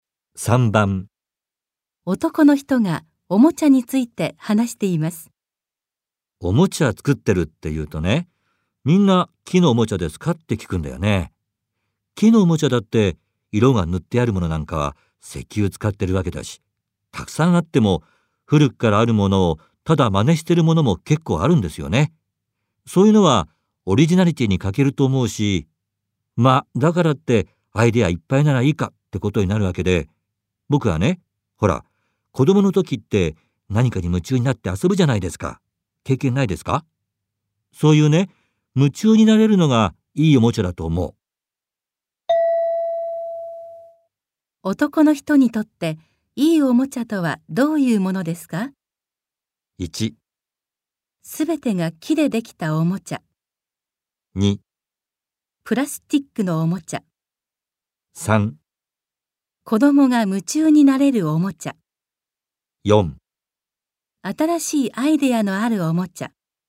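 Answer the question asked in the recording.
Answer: 3: 子供が夢中になれるおもちゃ。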